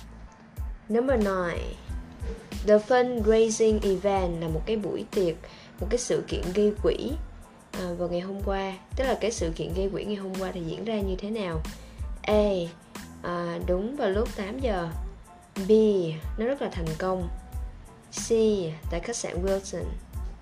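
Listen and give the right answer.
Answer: B: Nó rất là thành công.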